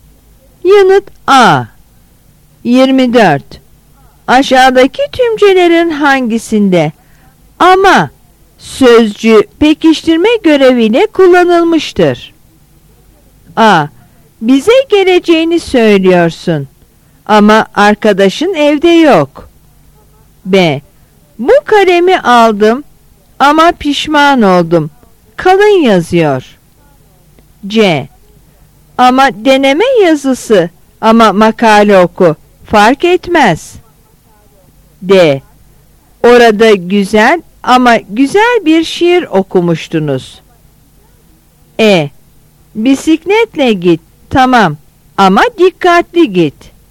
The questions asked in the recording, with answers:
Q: Aşağıdaki tümcelerin hangisinde ama sözcüğü pekiştirme göreviyle kullanılmıştır?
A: Yanıt D.